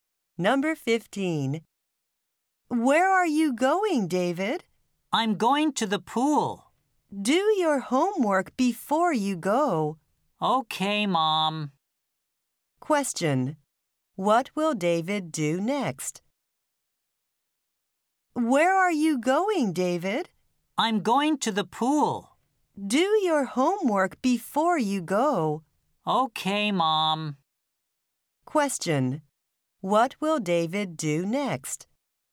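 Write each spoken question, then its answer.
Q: What will David do next?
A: Do his homework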